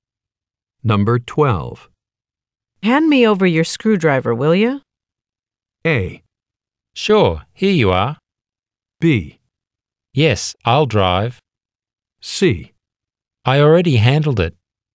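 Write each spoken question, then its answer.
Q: Hand me over your screwdriver, will you?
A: A: Sure, here you are.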